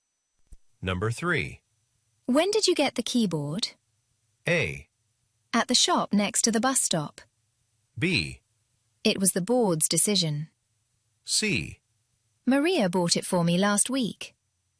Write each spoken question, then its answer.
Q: When did you get the keyboard?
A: 어쨌든 언제 얻었습니까라고 했으니까 Maria가 지난주에 사 주었습니다라는 것은 정확한 의도 캐치는 된 거거든요.